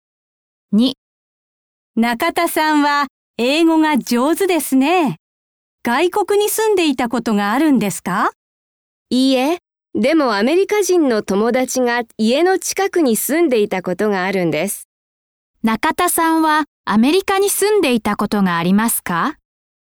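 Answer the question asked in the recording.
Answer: いいえ、ありません。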